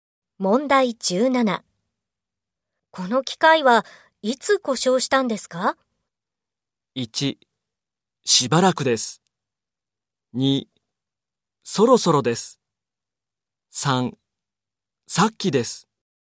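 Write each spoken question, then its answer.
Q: この機械はいつ故障したんですか?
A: 2: さっきです。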